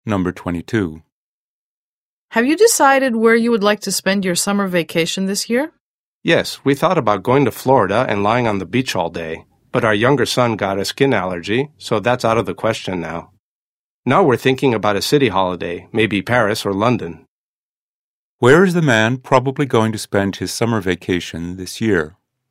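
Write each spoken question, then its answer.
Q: Where is the man probably going to spend his summer vacation this year?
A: In a city, maybe Paris or London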